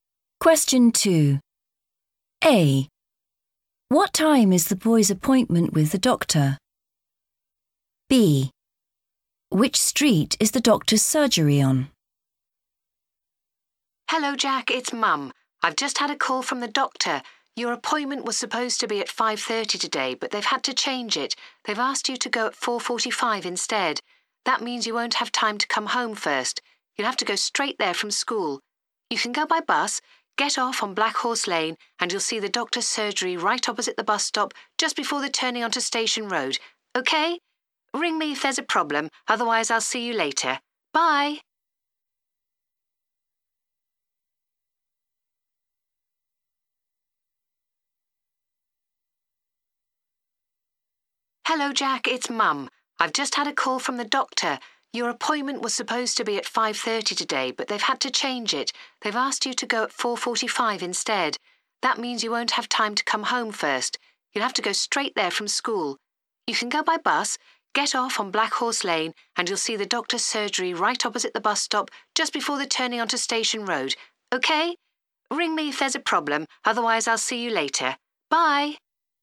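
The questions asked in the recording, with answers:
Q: What time is the boy's appointment with the doctor?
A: 4:45

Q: Which street is the doctor's surgery on?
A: Black Horse Lane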